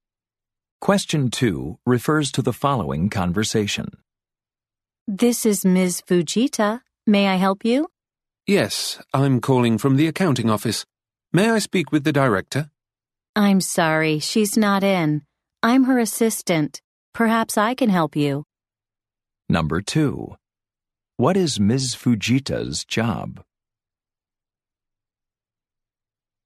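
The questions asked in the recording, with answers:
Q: What is Ms. Fujita's job?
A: She is the director's assistant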